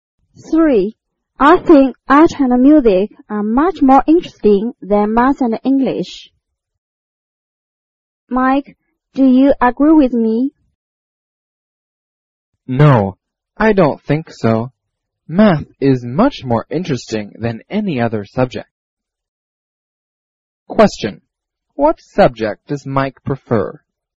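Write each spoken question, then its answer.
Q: What subject does Mike prefer?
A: Math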